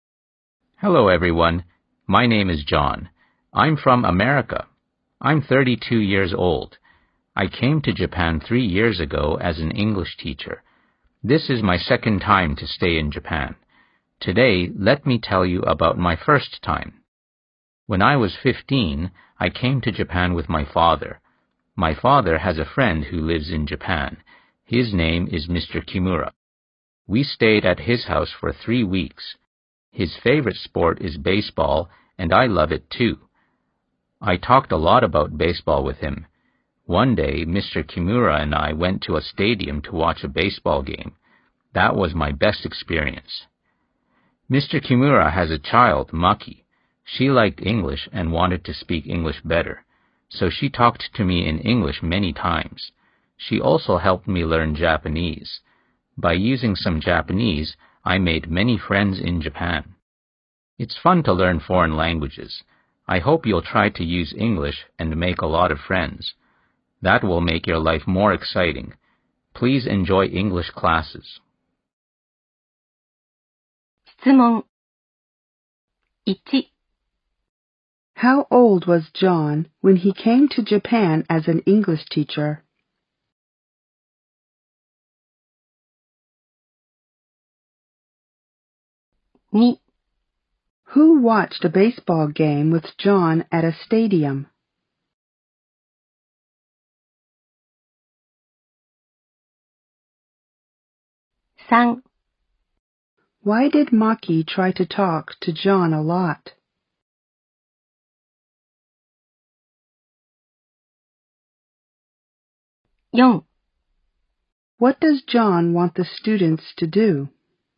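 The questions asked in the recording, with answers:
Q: How old was John when he came to Japan as an English teacher?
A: He was 29 years old.

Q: Who watched a baseball game with John at a stadium?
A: Mr. Kimura

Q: Why did Maki try to talk to John a lot?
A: Because she liked English and wanted to speak English better.

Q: What does John want the students to do?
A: To try to use English and make a lot of friends.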